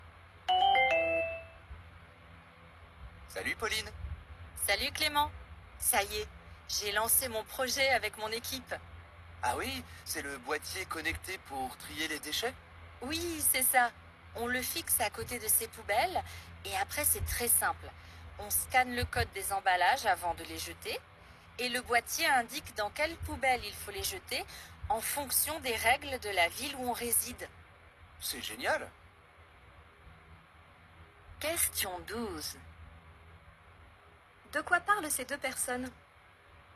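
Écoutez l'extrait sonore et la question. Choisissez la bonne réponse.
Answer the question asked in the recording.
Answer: D'un boîtier connecté pour trier les déchets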